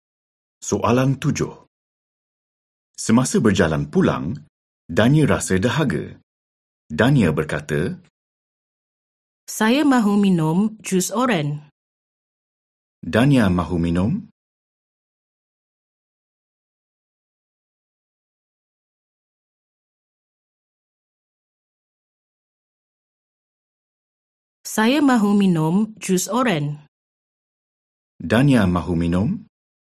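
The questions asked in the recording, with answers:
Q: Dania mahu minum?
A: Jus oren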